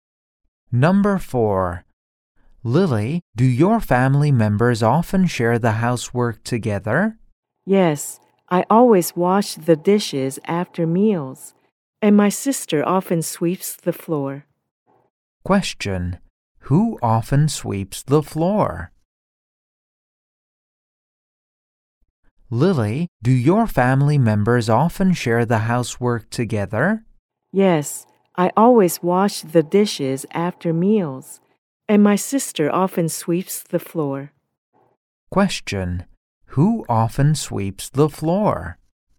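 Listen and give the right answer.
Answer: Lily's sister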